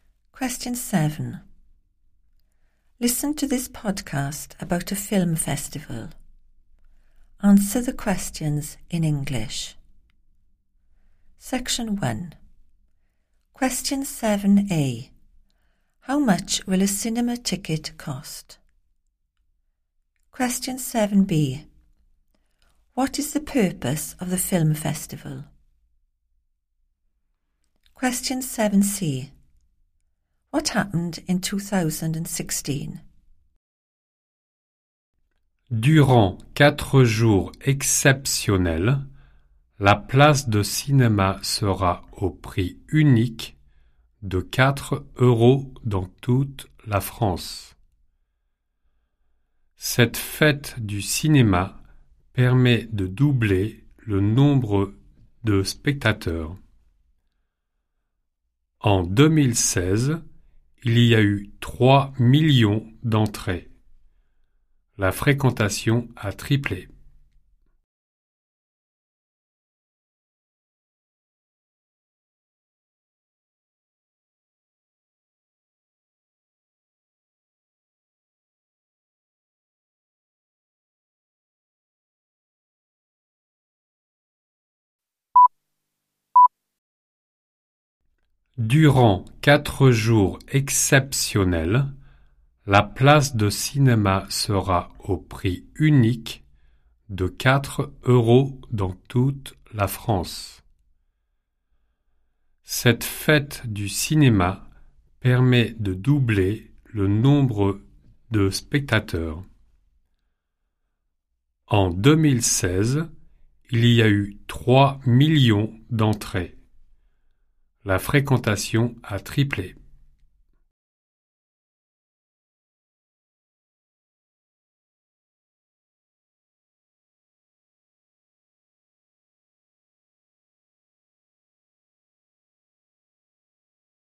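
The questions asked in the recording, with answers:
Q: How much will a cinema ticket cost?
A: 4 euros

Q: What is the purpose of the film festival?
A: to double the number of cinema-goers

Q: What happened in 2016?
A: 3 million admissions; attendance tripled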